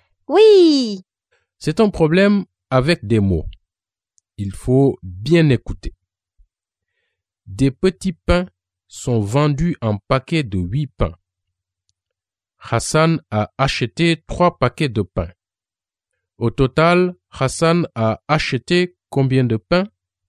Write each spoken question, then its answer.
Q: Au total, Hassan a acheté combien de pain?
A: Hassan a acheté 24 pains, car 8 multiplié par 3 égale 24.